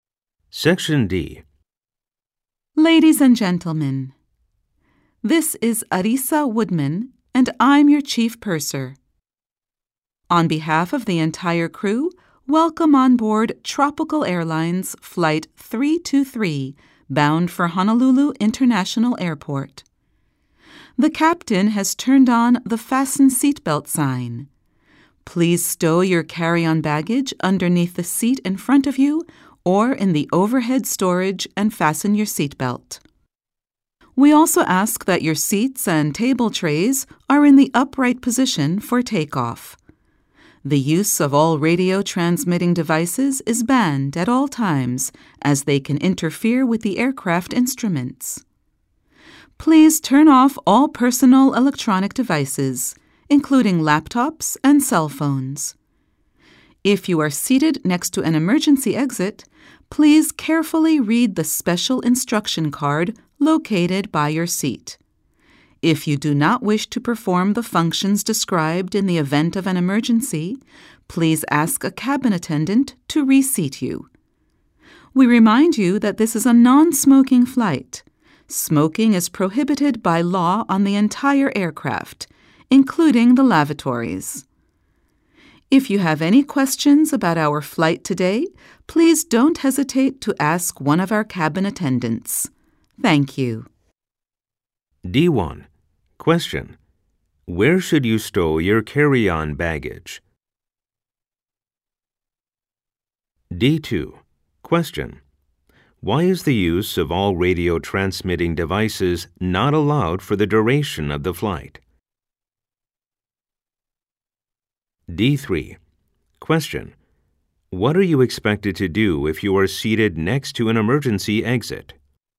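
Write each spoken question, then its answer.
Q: Where should you stow your carry-on baggage?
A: Underneath the seat in front of you or in the overhead storage

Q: Why is the use of all radio transmitting devices not allowed for the duration of the flight?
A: They can interfere with the aircraft instruments

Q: What are you expected to do if you are seated next to an emergency exit?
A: Carefully read the special instruction card located by your seat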